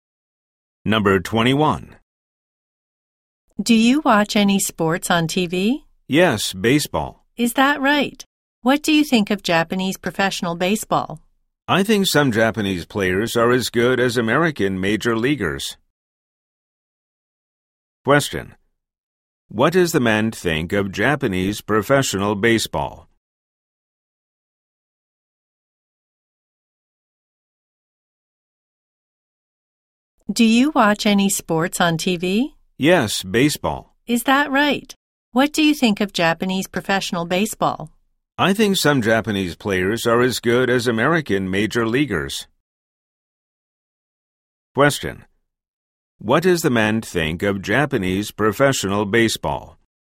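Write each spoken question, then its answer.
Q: What does the man think of Japanese professional baseball?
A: Some Japanese players are as good as American major leaguers.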